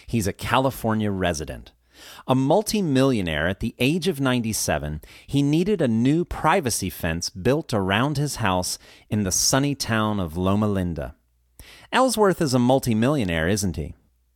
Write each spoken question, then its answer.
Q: Ellsworth is a multimillionaire, isn't he?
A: Yes, he is. He's a multimillionaire.